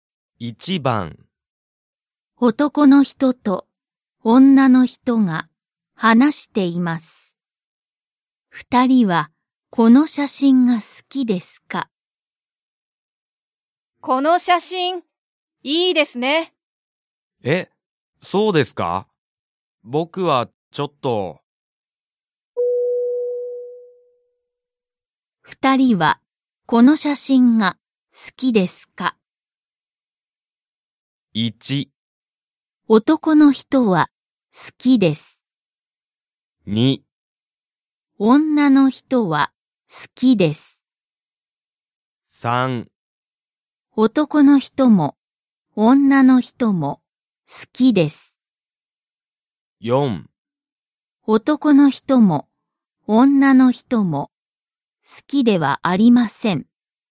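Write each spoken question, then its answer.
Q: 二人はこの写真が好きですか?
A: 2: 女の人は好きです。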